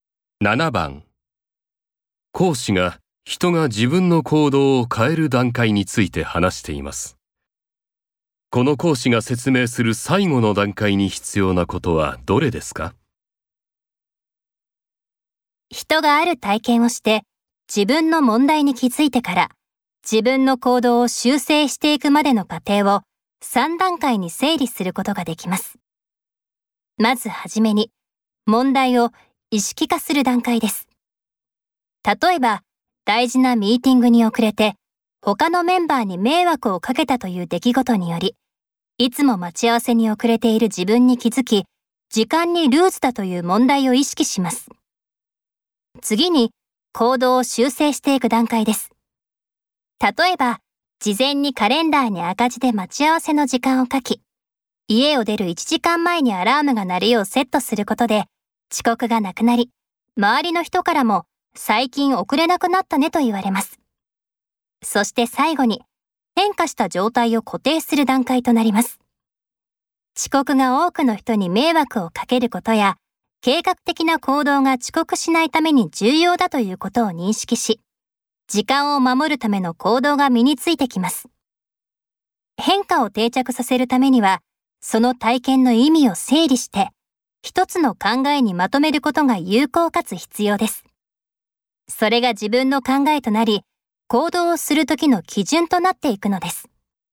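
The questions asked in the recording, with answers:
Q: この講師が説明する最後の段階に必要なことはどれですか?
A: 体験の意味を整理して、一つの考えにまとめること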